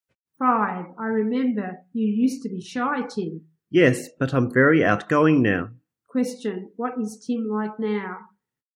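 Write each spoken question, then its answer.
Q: What is Tim like now?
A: Very outgoing.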